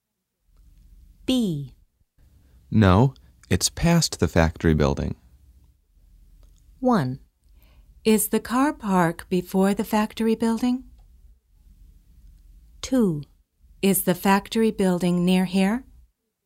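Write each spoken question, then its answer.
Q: No, it's past the factory building.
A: 1: Is the car park before the factory building?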